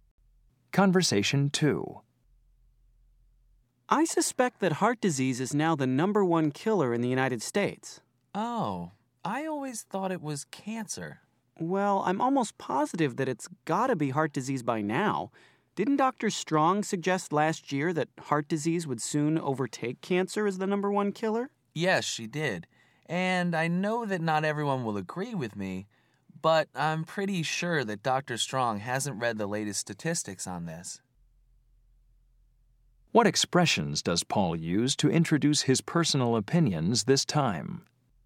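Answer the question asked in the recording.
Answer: "I always thought" and "I know that not everyone will agree with me, but I'm pretty sure"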